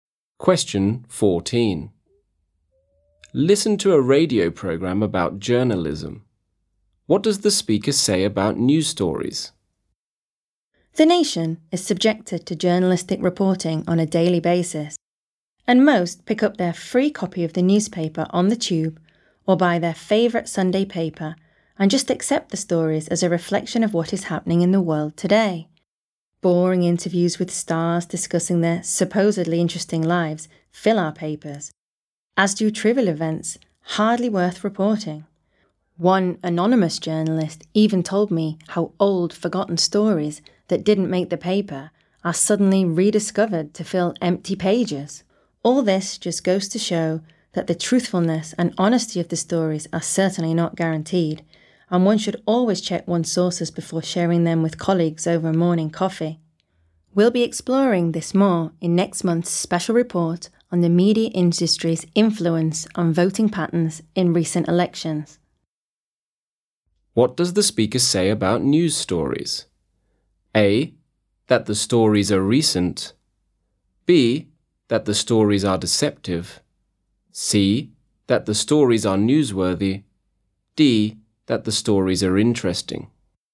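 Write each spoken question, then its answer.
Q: What does the speaker say about news stories?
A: B: that the stories are deceptive.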